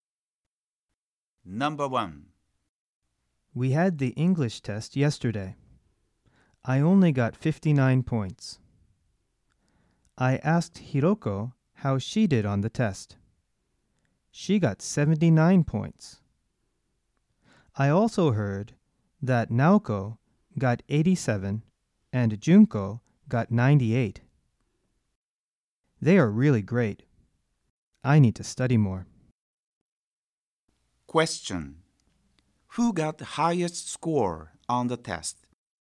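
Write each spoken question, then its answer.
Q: Who got the highest score on the test?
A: Junko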